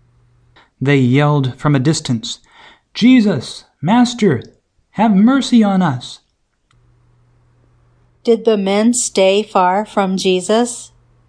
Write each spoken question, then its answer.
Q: Did the men stay far from Jesus?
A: Yes. The men stayed at a distance.